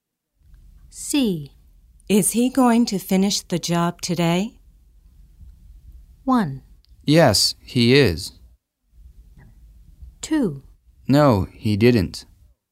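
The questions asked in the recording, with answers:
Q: Is he going to finish the job today?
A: 1: Yes, he is.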